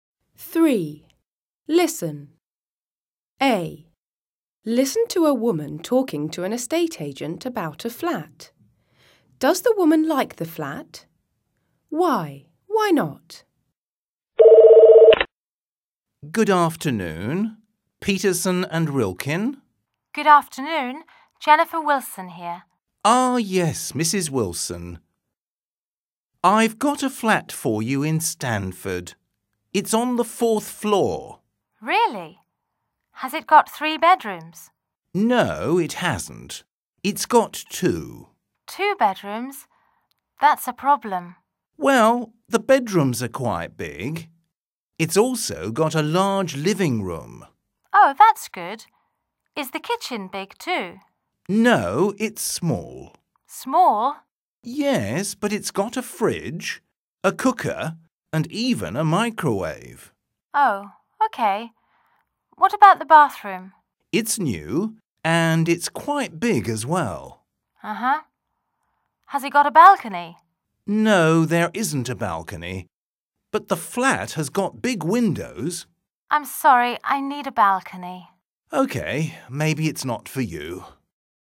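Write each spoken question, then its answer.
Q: Does the woman like the flat?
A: No

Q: Why? Why not?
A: It has only 2 bedrooms, not 3, and it hasn't got a balcony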